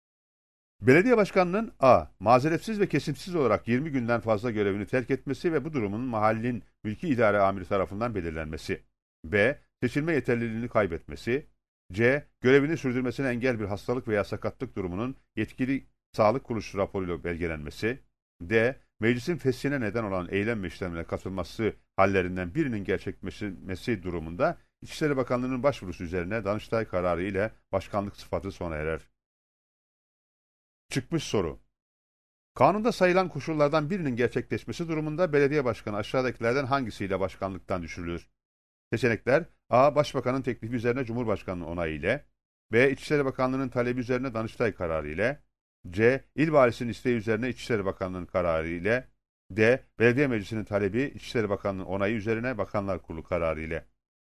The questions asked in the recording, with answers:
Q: Kanunda sayılan koşullardan birinin gerçekleşmesi durumunda belediye başkanı aşağıdakilerden hangisiyle başkanlıktan düşürülür?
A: Doğru cevap B seçeneğidir.